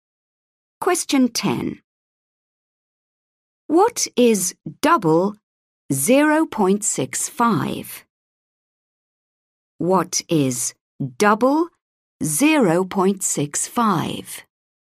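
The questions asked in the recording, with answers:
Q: What is double 0.65?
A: 1.3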